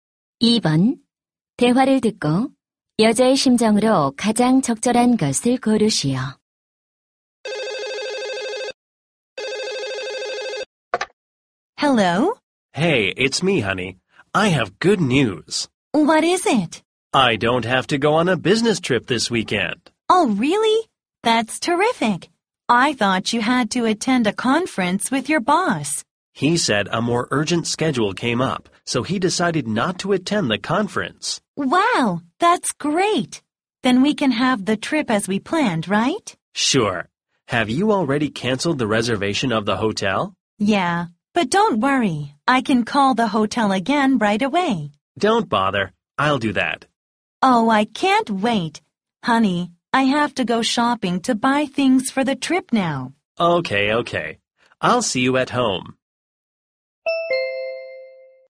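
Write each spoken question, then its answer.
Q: 대화를 듣고 여자의 심정으로 가장 적절한 것을 고르시오.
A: 신남 (excited)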